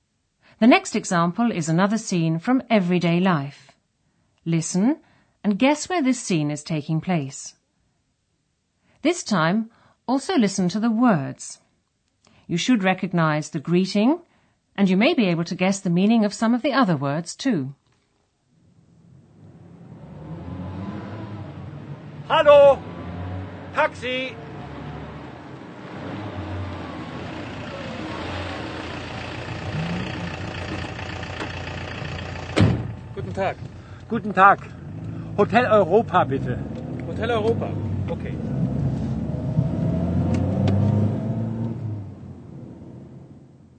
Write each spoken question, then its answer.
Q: Listen and guess where this scene is taking place.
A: A man is on the street. He hails a taxi, which is the same word in German, and tells the driver he wants to go to a hotel.